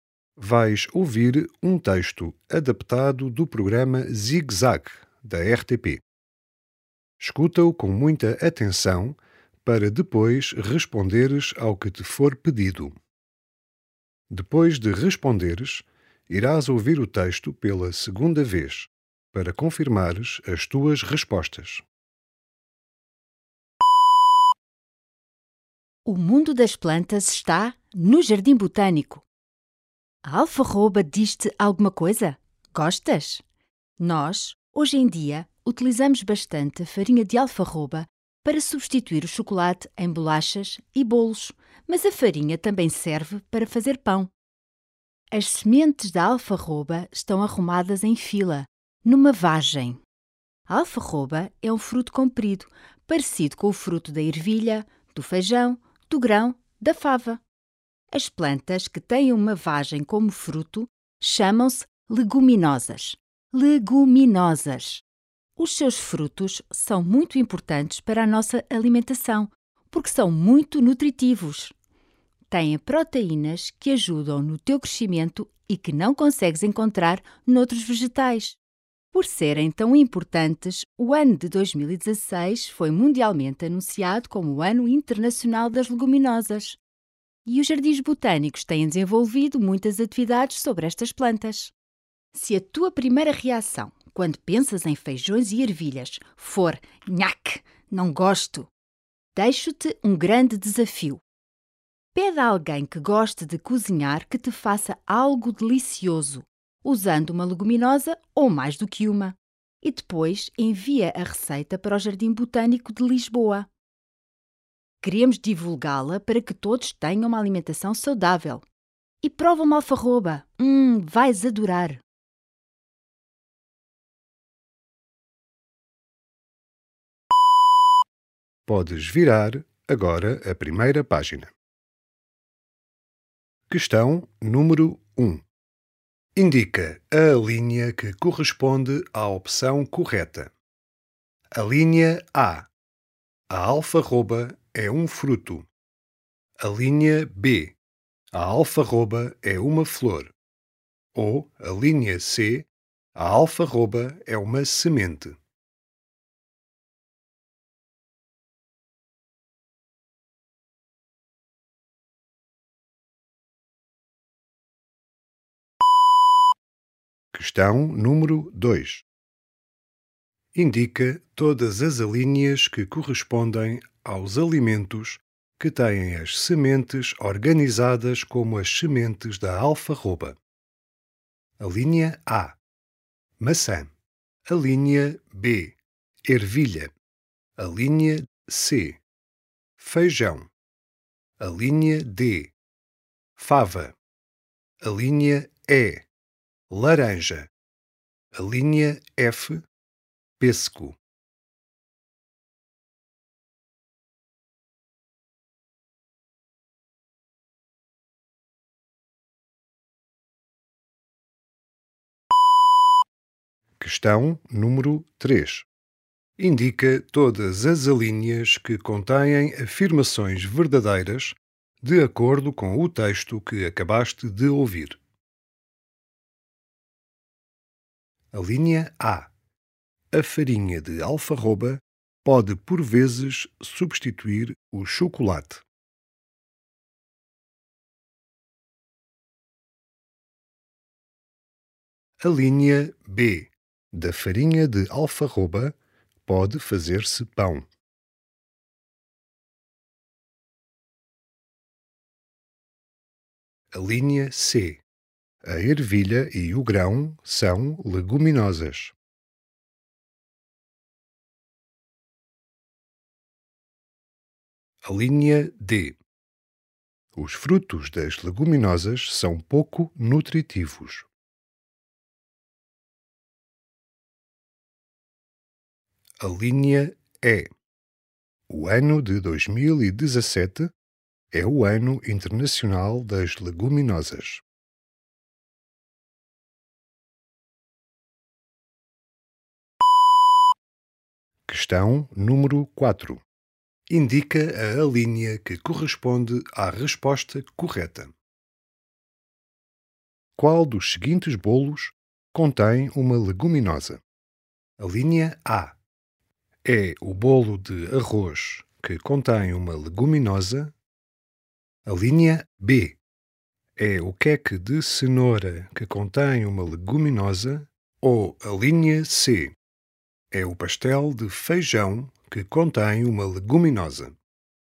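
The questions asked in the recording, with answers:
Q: Indica a linha que corresponde à opção correta.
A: A: A alfarroba é um fruto.

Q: Indica todas as alíneas que correspondem aos alimentos que têm as sementes organizadas como as sementes da alfarroba.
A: B, C, D: Ervilha, Feijão, Fava

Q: Indica todas as alíneas que contêm afirmações verdadeiras de acordo com o texto que acabaste de ouvir.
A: A, B, C

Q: Qual dos seguintes bolos contém uma leguminosa?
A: C: É o pastel de feijão que contém uma leguminosa.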